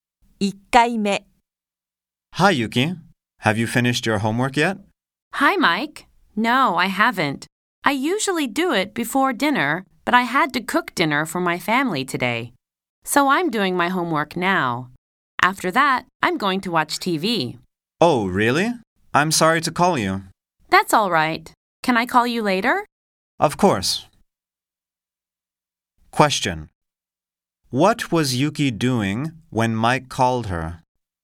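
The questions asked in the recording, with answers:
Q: What was Yuki doing when Mike called her?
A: She was doing her homework.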